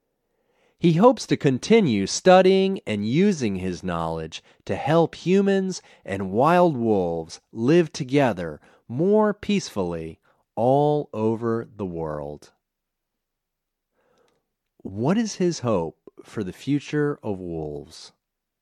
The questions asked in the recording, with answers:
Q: What is his hope for the future of wolves?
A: He hopes that wolves and humans will live together more peacefully all over the world.